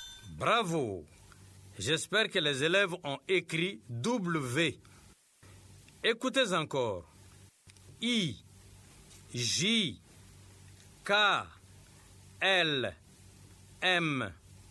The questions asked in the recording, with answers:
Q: I, J, K L M.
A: J'espère que les élèves ont écrit N.